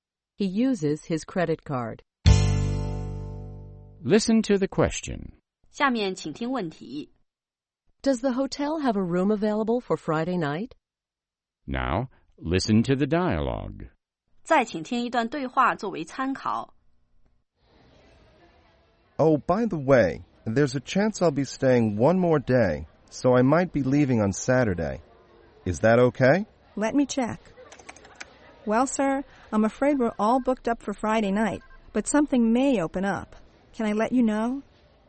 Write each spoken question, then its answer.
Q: Does the hotel have a room available for Friday night?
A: No, the hotel is fully booked on Friday night.